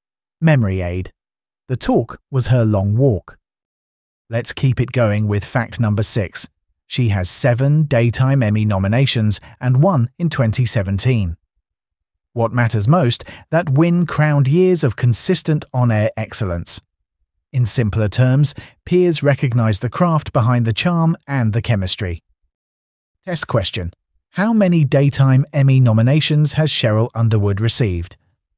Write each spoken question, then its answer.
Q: How many Daytime Emmy nominations has Sheryl Underwood received?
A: Correct answer. 7.